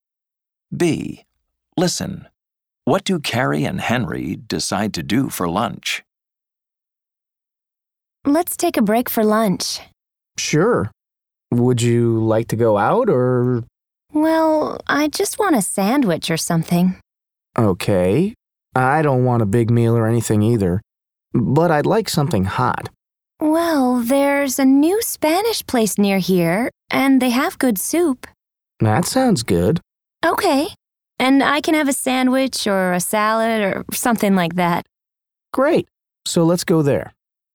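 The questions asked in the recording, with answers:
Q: What do Carrie and Henry decide to do for lunch?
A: Go to the new Spanish place nearby for soup and a sandwich or salad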